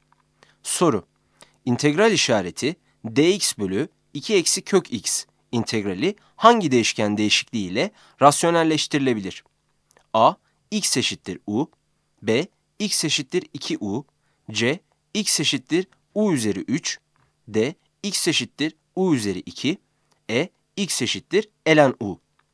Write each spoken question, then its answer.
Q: İntegral işareti dx bölü 2 eksi kök x integrali hangi değişken değişikliği ile rasyonelleştirilebilir?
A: Yanıt D'dir.